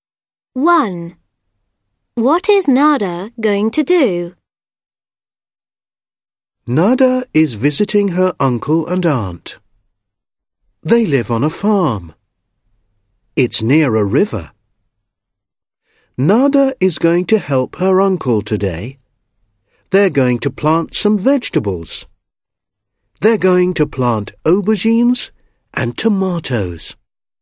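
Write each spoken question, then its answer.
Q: What is Nada going to do?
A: Help her uncle plant vegetables (aubergines and tomatoes)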